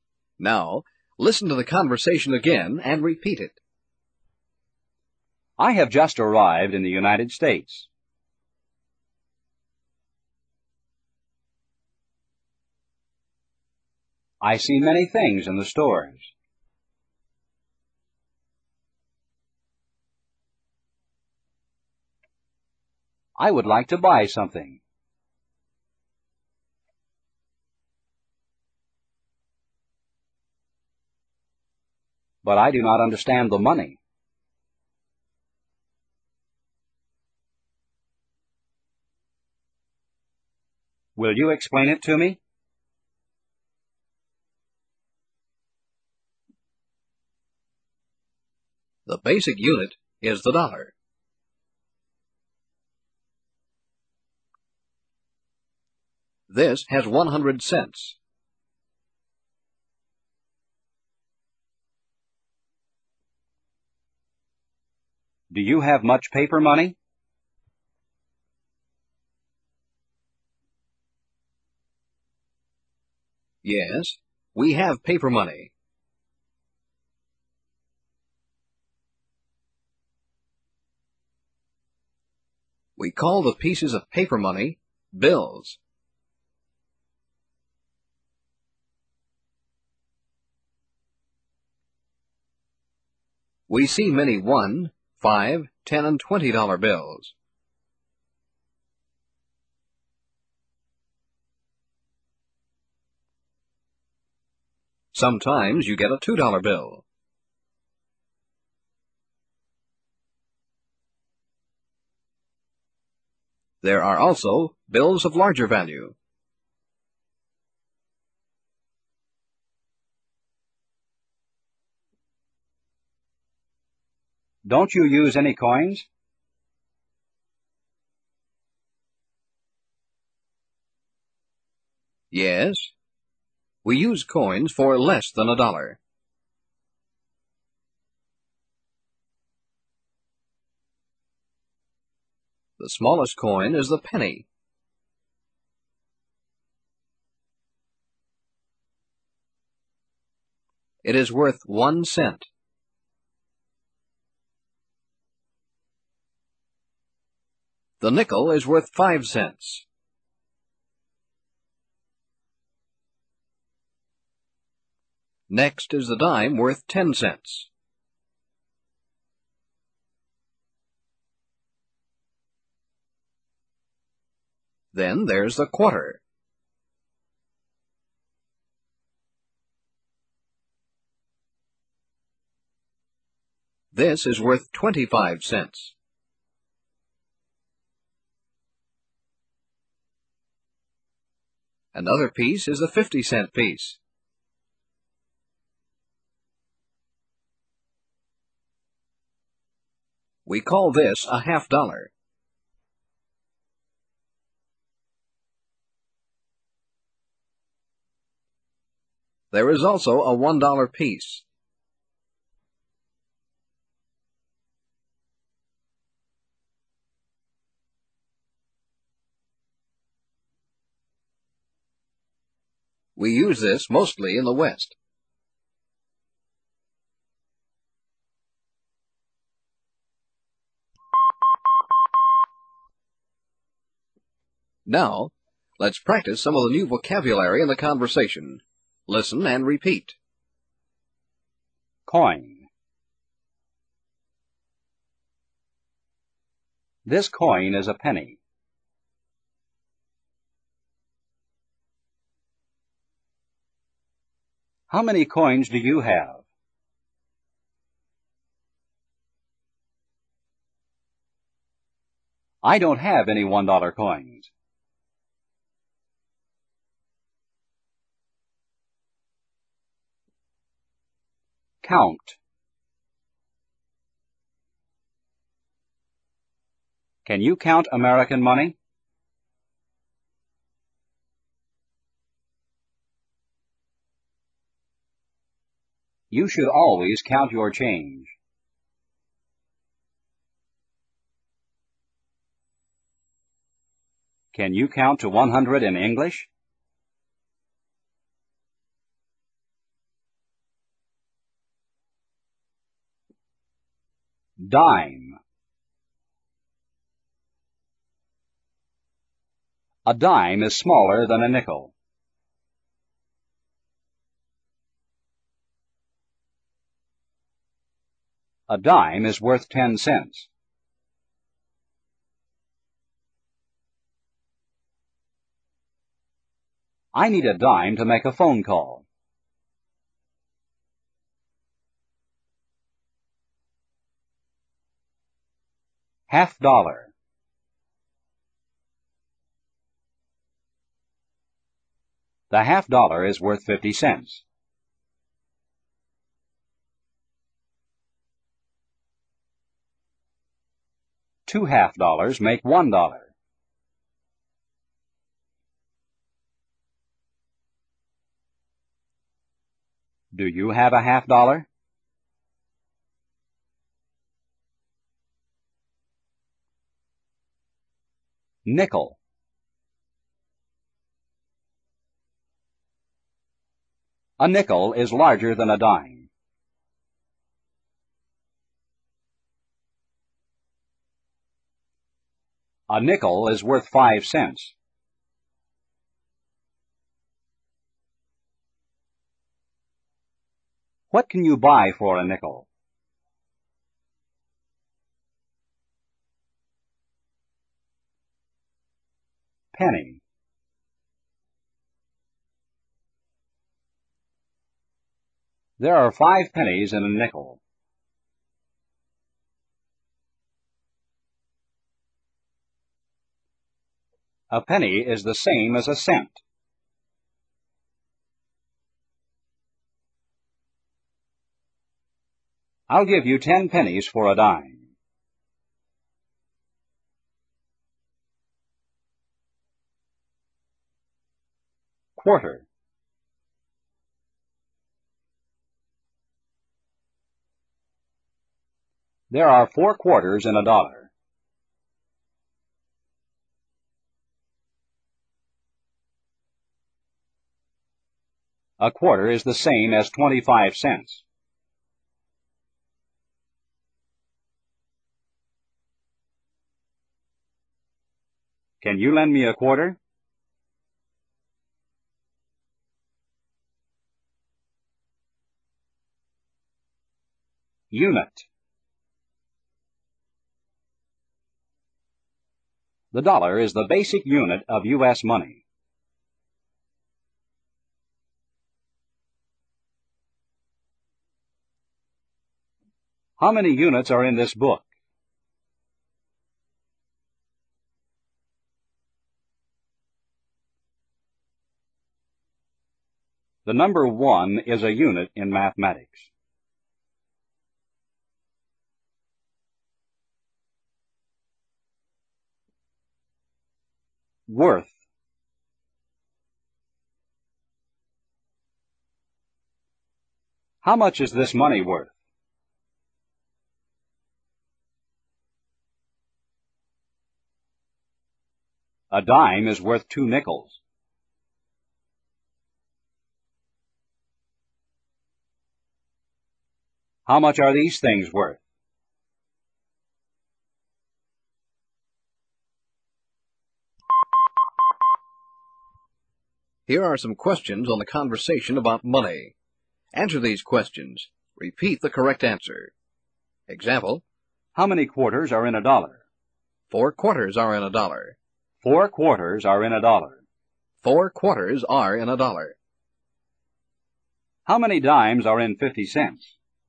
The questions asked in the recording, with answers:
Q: How many dimes are in 50 cents?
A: Five dimes are in 50 cents.